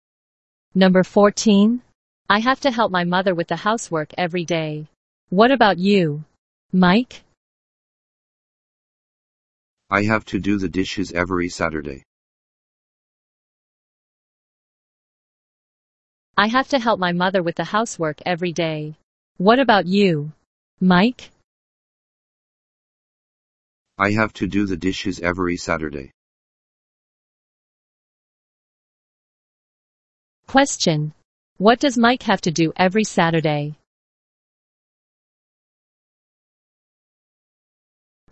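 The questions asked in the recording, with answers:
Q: Question. What does Mike have to do every Saturday?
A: Do the dishes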